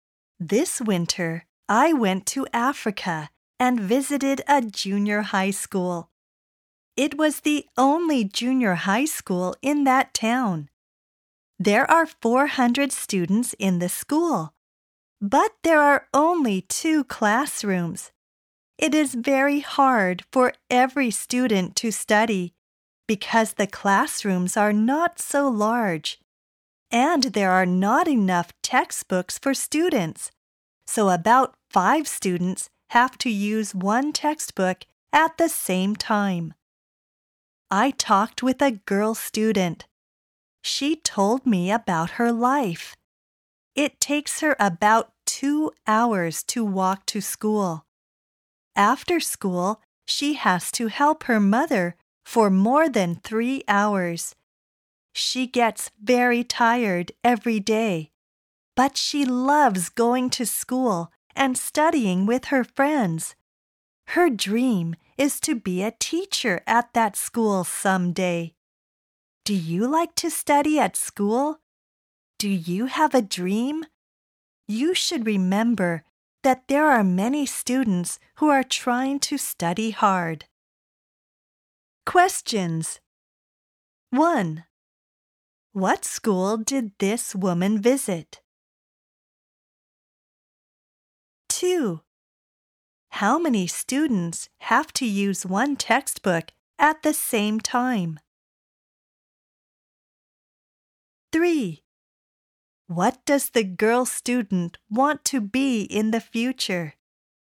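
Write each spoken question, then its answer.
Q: What school did this woman visit?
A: A junior high school in Africa

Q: How many students have to use 1 textbook at the same time?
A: About 5 students

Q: What does the girl student want to be in the future?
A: A teacher at that school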